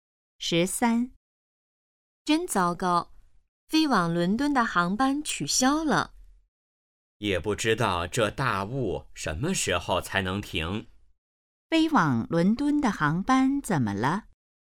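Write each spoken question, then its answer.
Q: 飞往伦敦的航班怎么了?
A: 因大雾取消了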